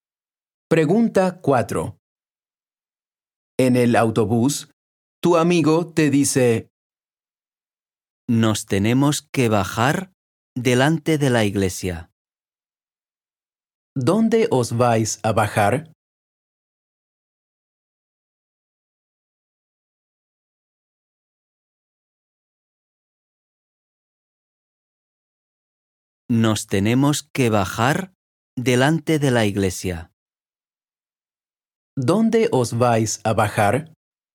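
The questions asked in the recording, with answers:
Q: ¿Dónde os vais a bajar?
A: delante de la iglesia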